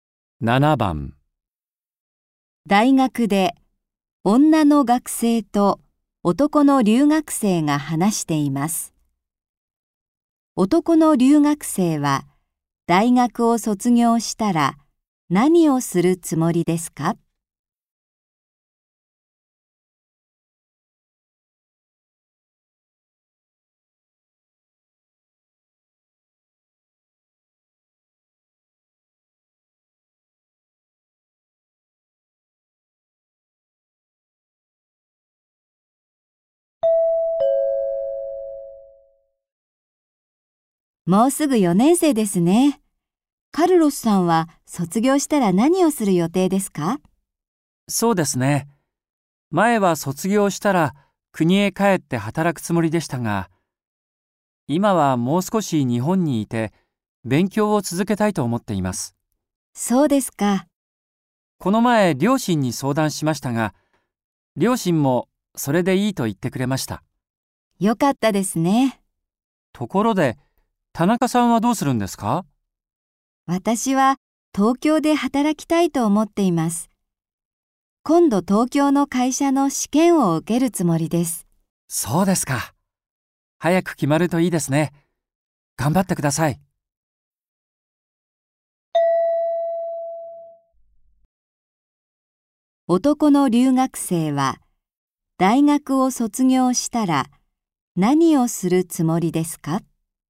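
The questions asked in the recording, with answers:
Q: 男の留学生は大学を卒業したら何をするつもりですか?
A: もう少し日本にいて勉強を続ける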